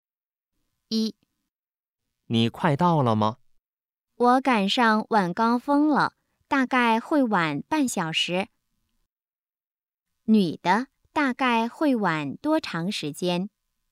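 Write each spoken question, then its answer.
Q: 女的,大概会晚多长时间?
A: 半小时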